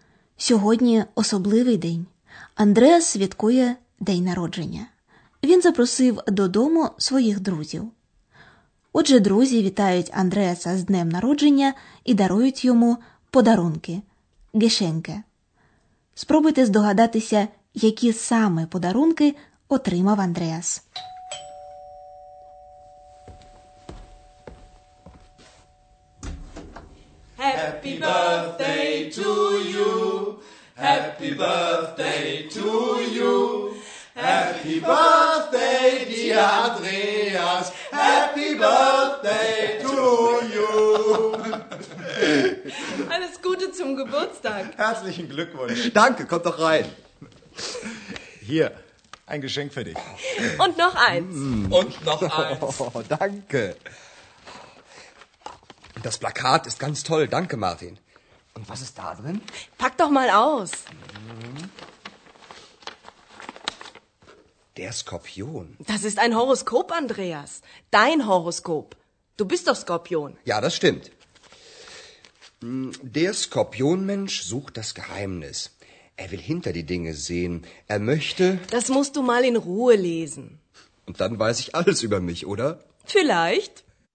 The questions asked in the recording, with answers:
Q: Спробуйте здогадатися, які саме подарунки отримав Андреас.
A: Andreas розгортає два подарунки: плакат і гороскоп, який для нього склала одна з гостей.